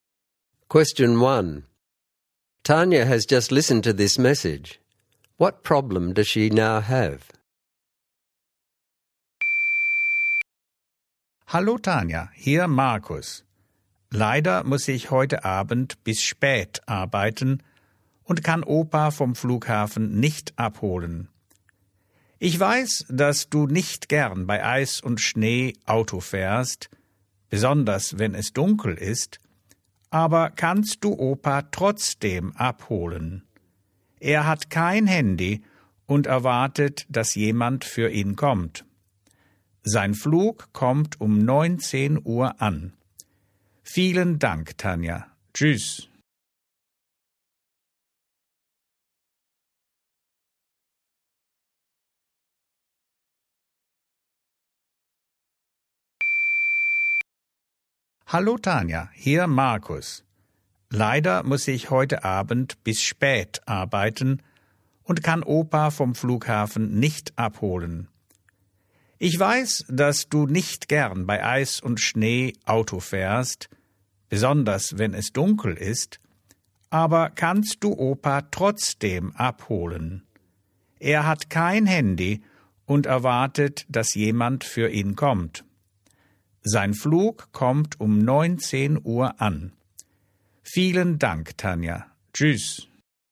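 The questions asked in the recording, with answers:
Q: What problem does she now have?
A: She must pick up her grandfather from the airport at 7 pm, driving in the dark on ice and snow, which she dislikes, and he has no mobile phone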